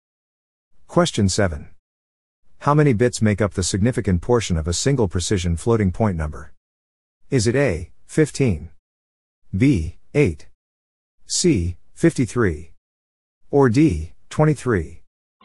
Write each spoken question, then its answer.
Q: How many bits make up the significant portion of a single precision floating point number?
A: The answer is D, 23.